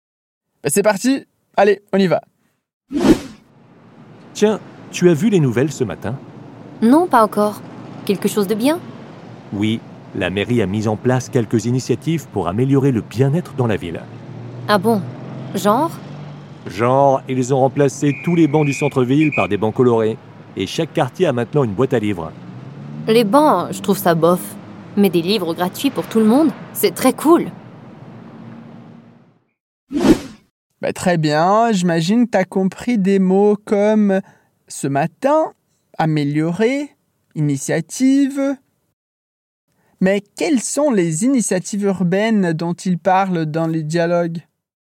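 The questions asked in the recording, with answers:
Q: Mais quelles sont les initiatives urbaines dont ils parlent dans les dialogues ?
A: Tous les bancs du centre-ville ont été remplacés par des bancs colorés, et chaque quartier a maintenant une boîte à livres.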